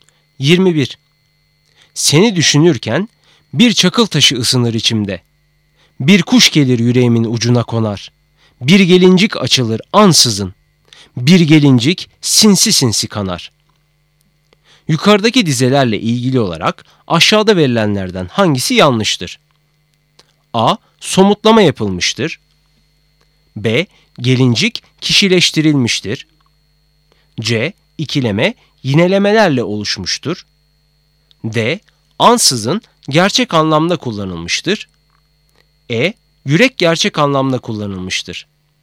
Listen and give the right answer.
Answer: Doğru cevap E. Yürek gerçek anlamda kullanılmıştır.